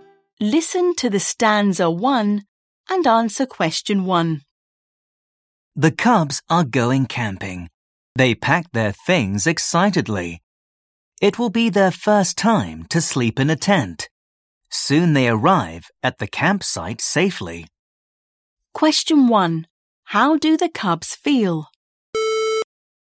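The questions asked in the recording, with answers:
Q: How do the cubs feel?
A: Excited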